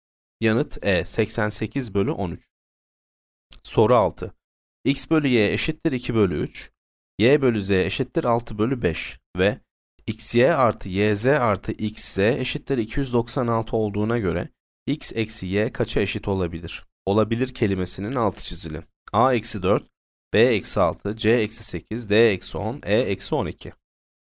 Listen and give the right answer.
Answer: Yanıt A eksi 4.